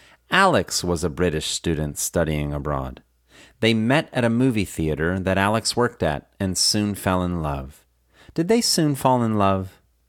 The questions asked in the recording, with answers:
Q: Did they soon fall in love?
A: Yes, they soon fell in love.